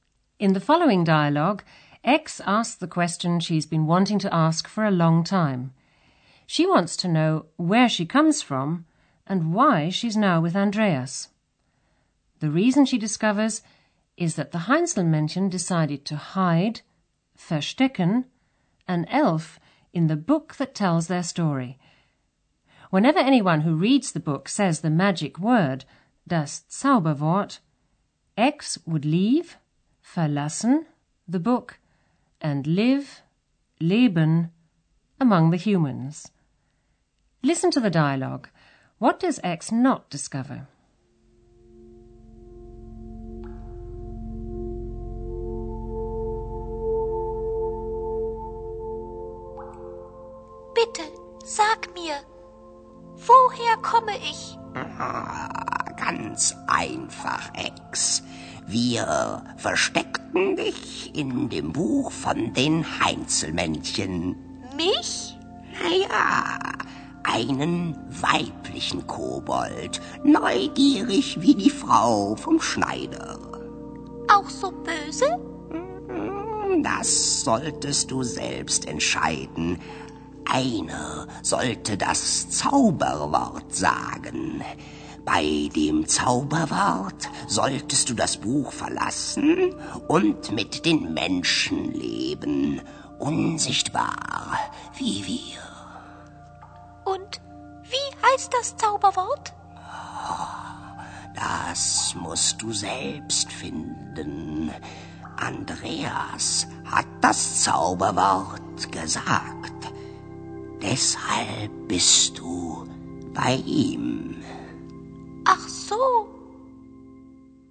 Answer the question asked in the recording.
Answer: But she doesn't discover what the magic word is.